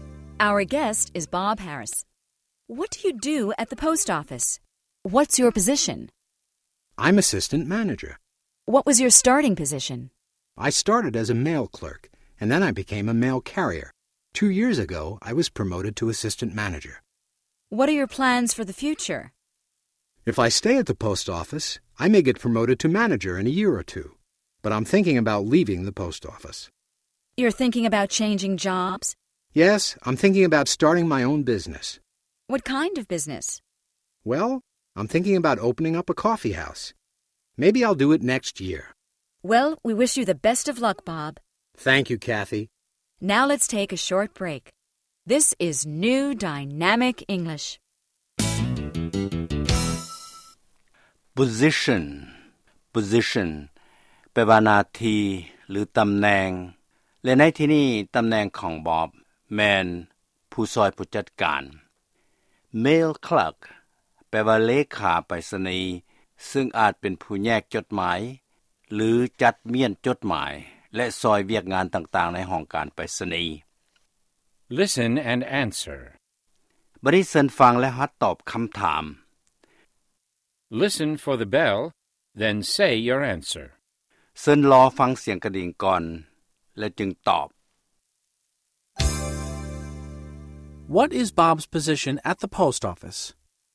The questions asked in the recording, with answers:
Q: What is Bob's position at the post office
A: He's assistant manager.